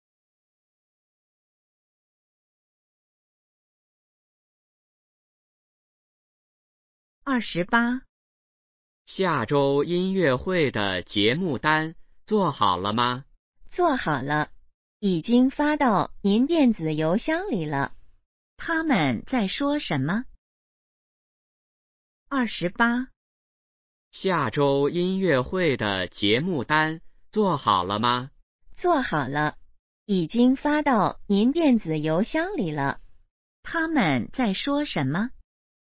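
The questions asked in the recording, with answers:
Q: 他们在说什么?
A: 音乐会的节目单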